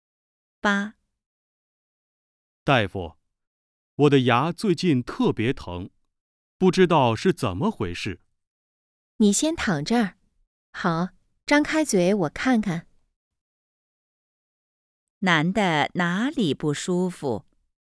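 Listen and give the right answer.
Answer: 牙疼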